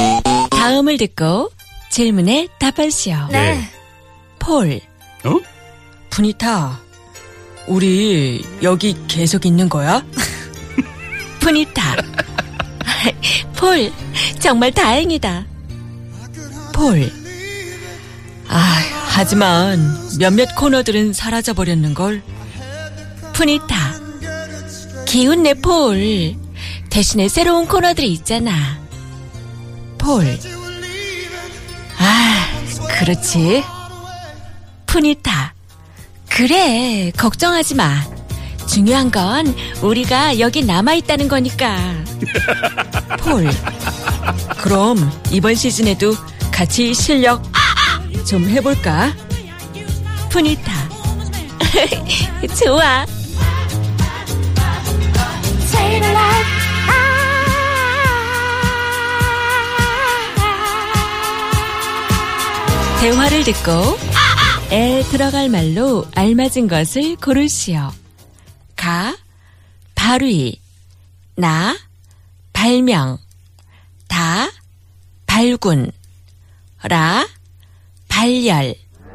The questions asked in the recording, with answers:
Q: 대화를 듣고 에 들어갈 말로 알맞은 것을 고르시오.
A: Ka, 그럼 이번 시즌에도 같이 실력 발휘 좀 해볼까?